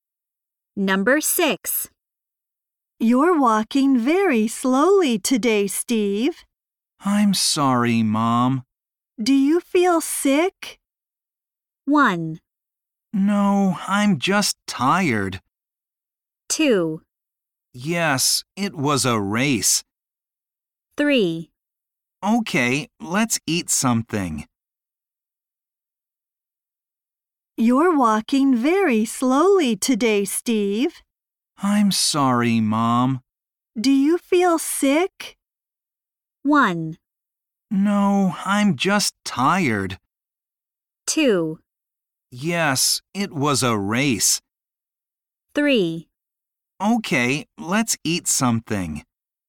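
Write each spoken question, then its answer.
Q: Do you feel sick?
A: 1: No, I'm just tired.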